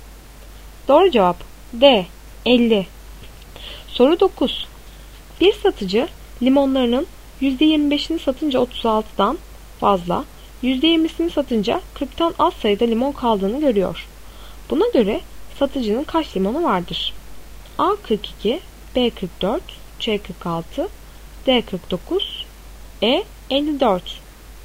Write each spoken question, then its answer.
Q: Buna göre satıcının kaç limonu vardır?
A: Doğru cevap D 49.